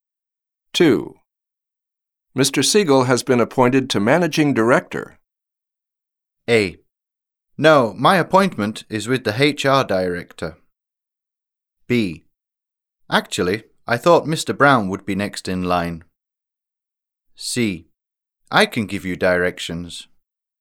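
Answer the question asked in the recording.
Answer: B: Actually, I thought Mr. Brown would be next in line.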